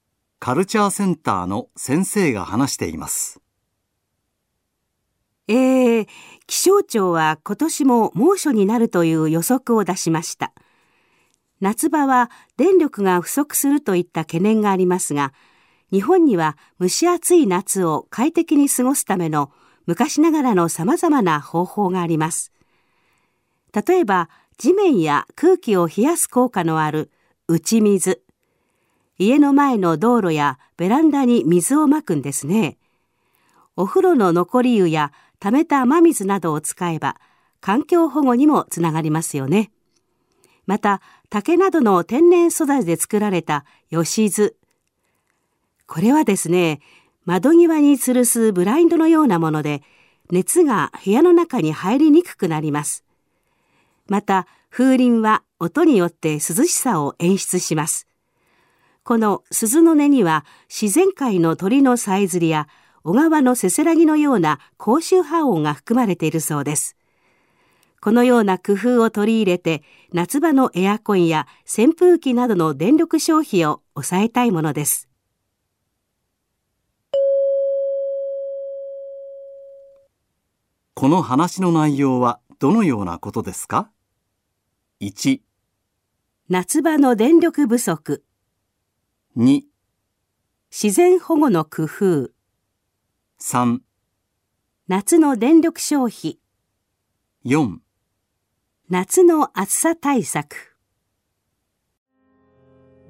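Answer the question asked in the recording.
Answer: 4: 夏の暑さ対策。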